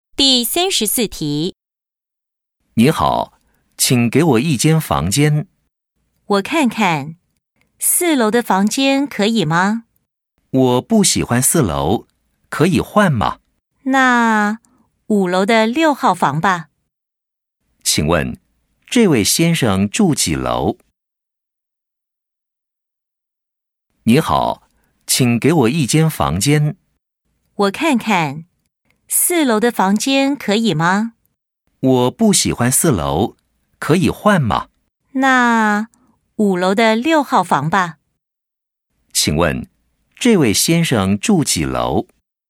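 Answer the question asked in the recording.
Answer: 五楼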